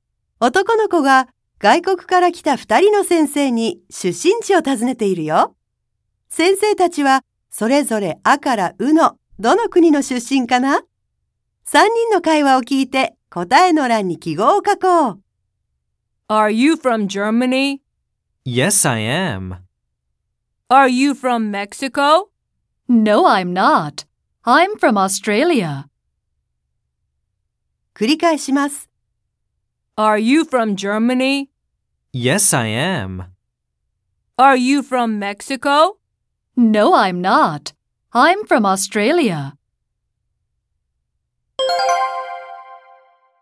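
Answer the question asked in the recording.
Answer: 1人目の先生はドイツ、2人目の先生はオーストラリア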